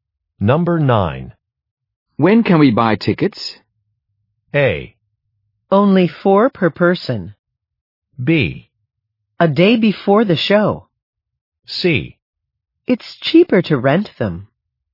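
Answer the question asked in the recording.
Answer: B: A day before the show.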